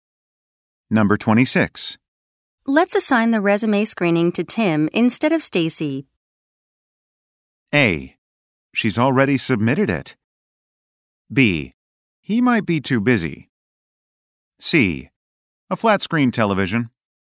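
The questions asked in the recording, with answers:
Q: Let's assign the resume screening to Tim instead of Stacy.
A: B: He might be too busy.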